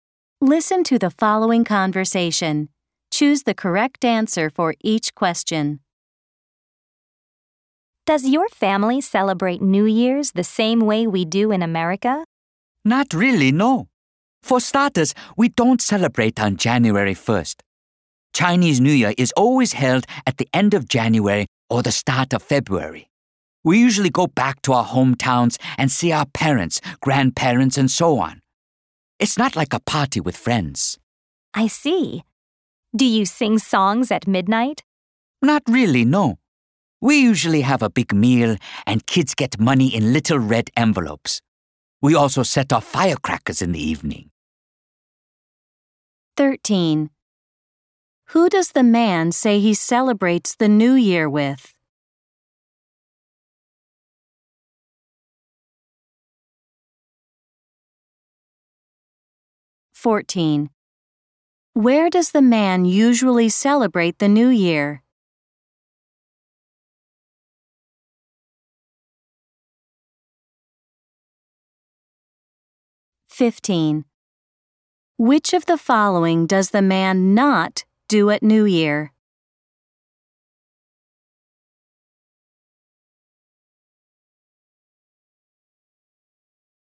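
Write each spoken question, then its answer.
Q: Who does the man say he celebrates the New Year with?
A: His family (parents, grandparents, and so on)

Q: Where does the man usually celebrate the New Year?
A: In his hometown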